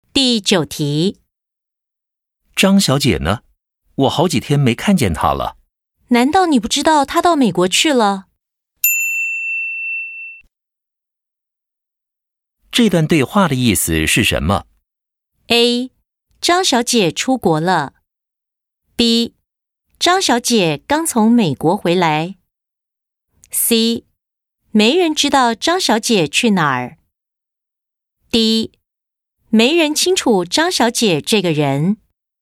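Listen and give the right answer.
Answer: A: 张小姐出国了。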